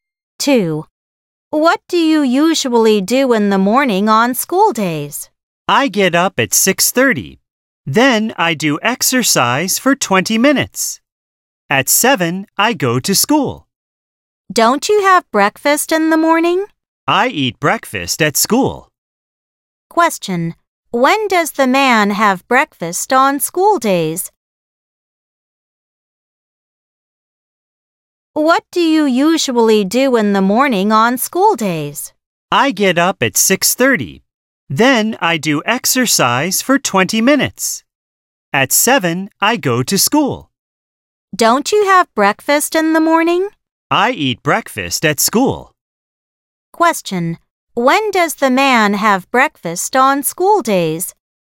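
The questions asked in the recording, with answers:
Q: When does the man have breakfast on school days?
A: At school, after 7 (after he goes to school)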